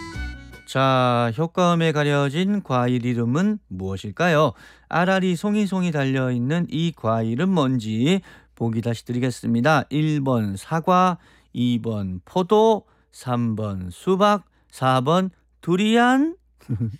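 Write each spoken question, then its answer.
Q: 아라리 송이송이 달려있는 이 과일은 뭔지 보기 다시 드리겠습니다.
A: 2: 포도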